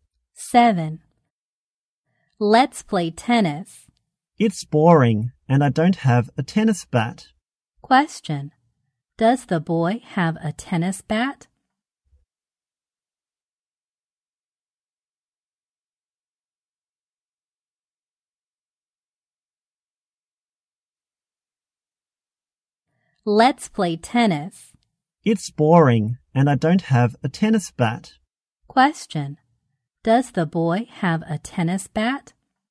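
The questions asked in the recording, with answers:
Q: Does the boy have a tennis bat?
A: No, he doesn't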